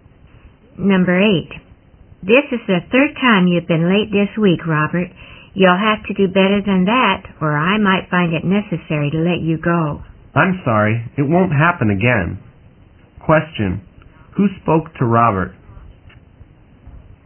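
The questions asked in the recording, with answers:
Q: Question, who spoke to Robert?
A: His boss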